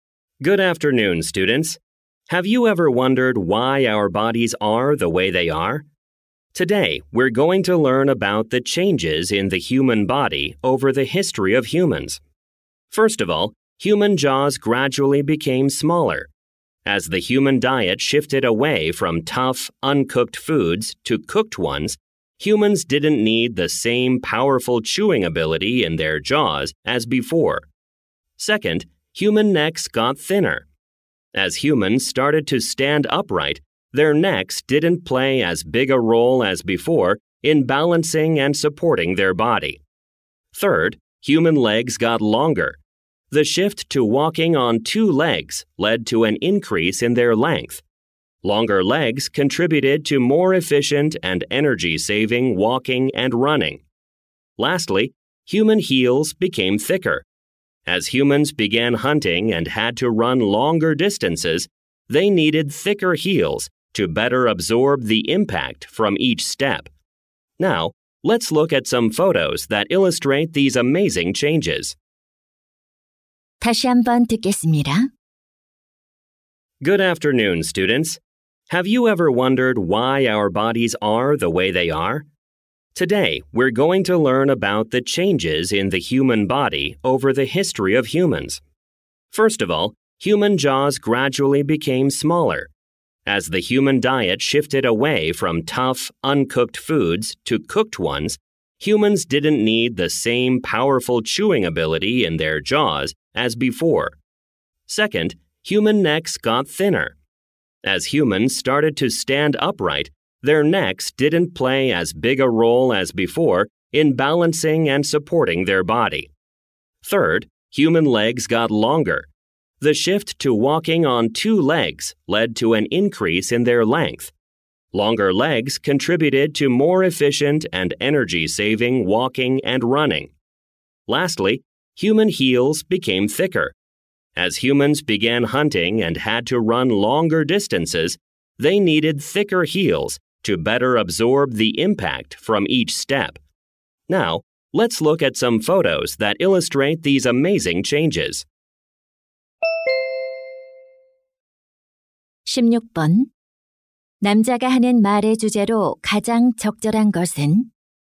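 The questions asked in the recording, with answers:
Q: 남자가 하는 말의 주제로 가장 적절한 것은?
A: 인류 역사에 걸친 인간 신체의 변화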